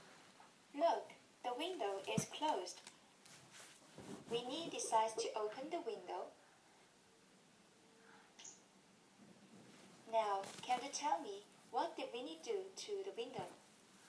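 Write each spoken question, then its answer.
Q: Now, can you tell me what did Winnie do to the window?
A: He opened the window.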